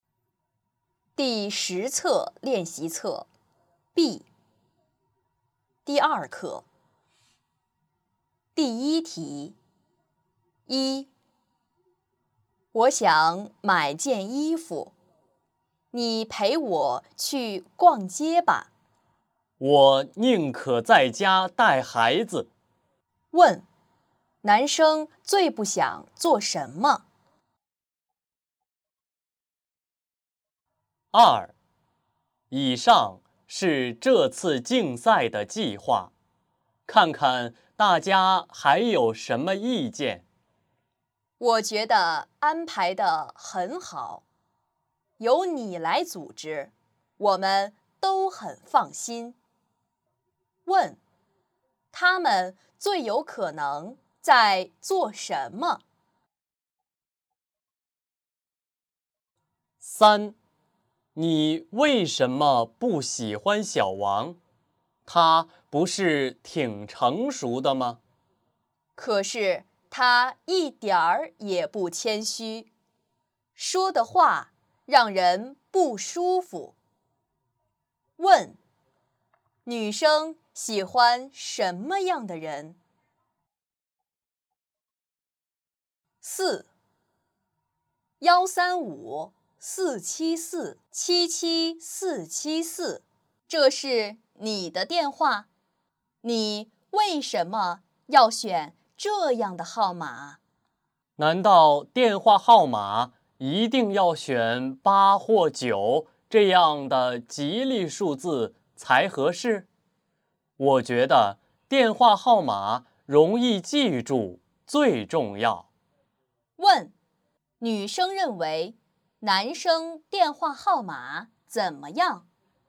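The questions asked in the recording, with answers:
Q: 问,男生最不想做什么?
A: 陪女生逛街

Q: 问,他们最有可能在做什么?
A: 讨论竞赛的计划

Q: 问,女生喜欢什么样的人?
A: 谦虚的人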